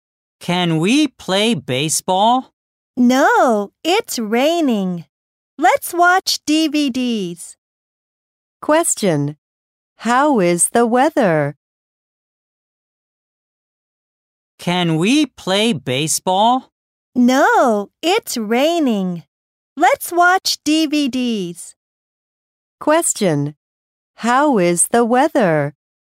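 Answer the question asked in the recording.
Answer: It's rainy.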